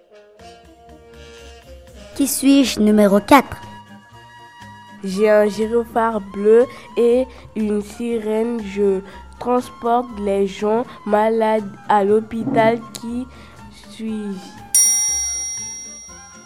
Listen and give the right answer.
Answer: Une ambulance.